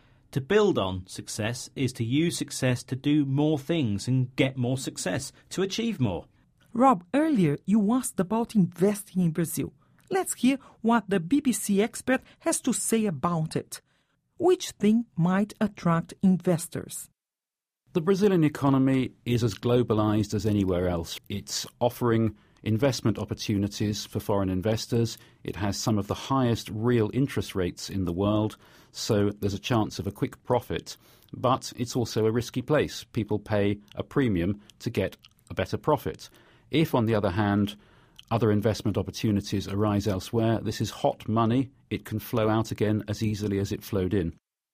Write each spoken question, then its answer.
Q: Which thing might attract investors?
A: So, the chance of a quick profit.